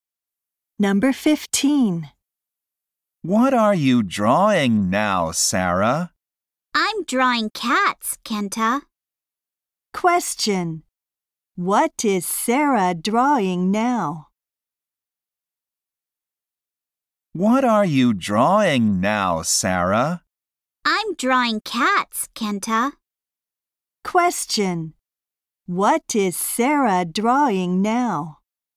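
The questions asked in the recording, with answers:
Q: What is Sarah drawing now?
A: Cats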